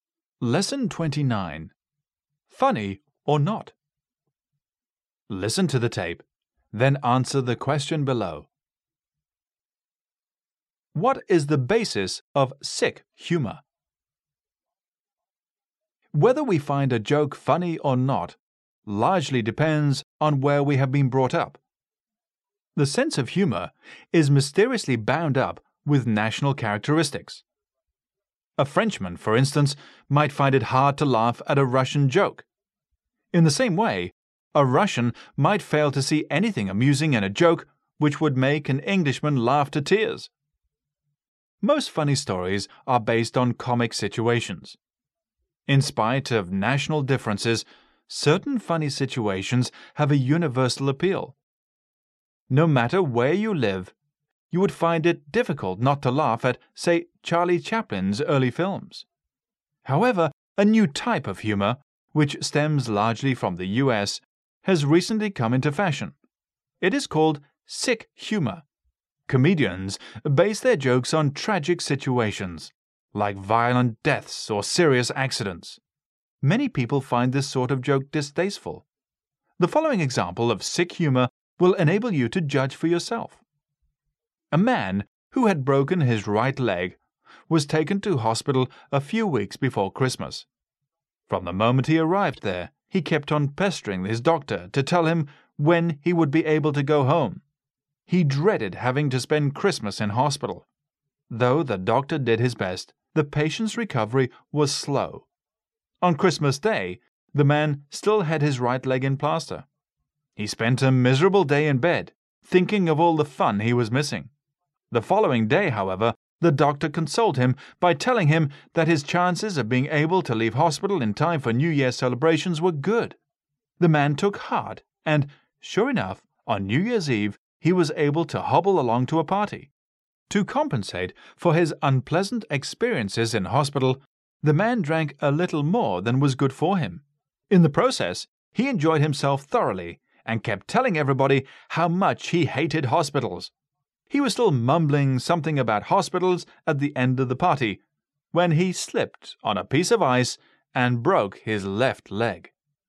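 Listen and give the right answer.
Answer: Tragic situations, like violent deaths or serious accidents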